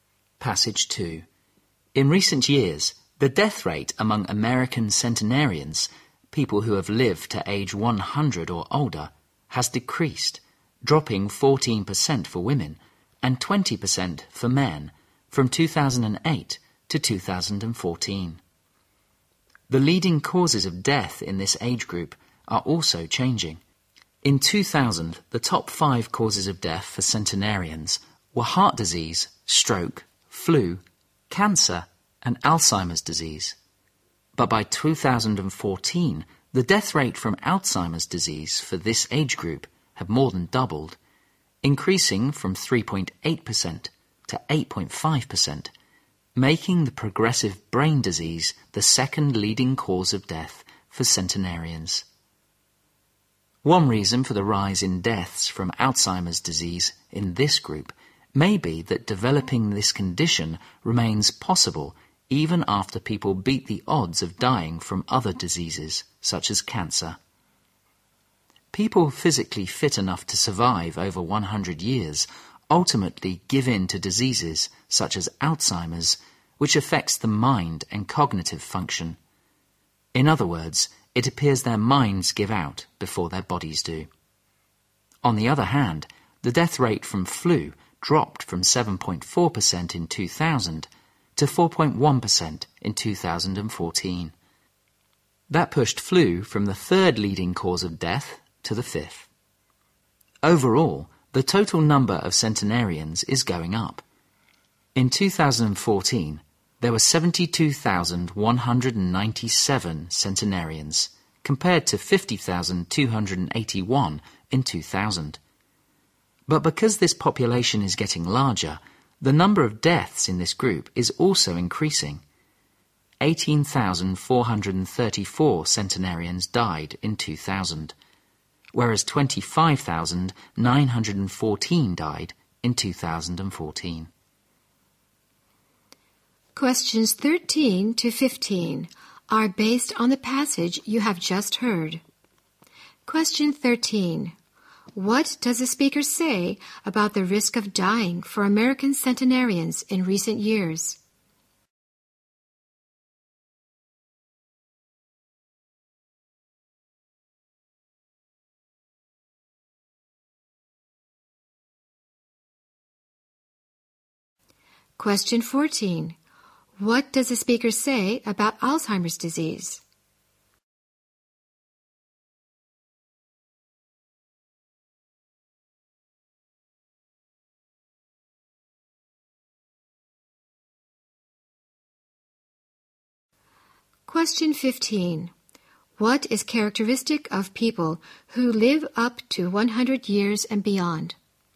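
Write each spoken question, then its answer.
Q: What does the speaker say about the risk of dying for American centenarians in recent years?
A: It has decreased.

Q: What does the speaker say about Alzheimer's disease?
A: It became the second leading cause of death for centenarians.

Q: What is characteristic of people who live up to 100 years and beyond?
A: Their minds give out before their bodies do.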